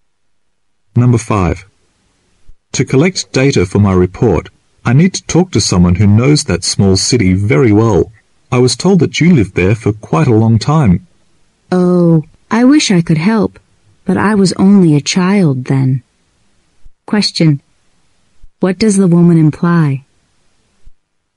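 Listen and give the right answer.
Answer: She can't help because she was only a child when she lived there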